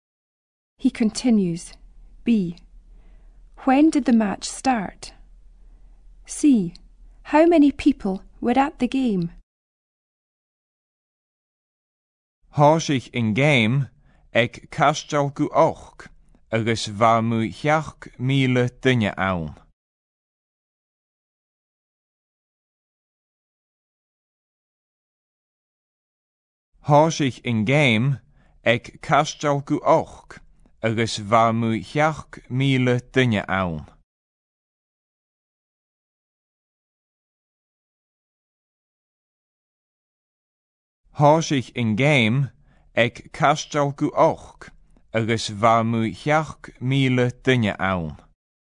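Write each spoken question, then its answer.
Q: When did the match start?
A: At quarter to eight

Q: How many people were at the game?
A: About seven thousand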